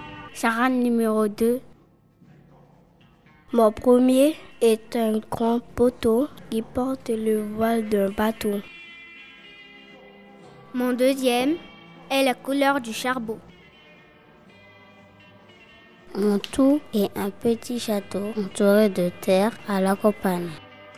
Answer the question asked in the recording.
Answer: le manoir.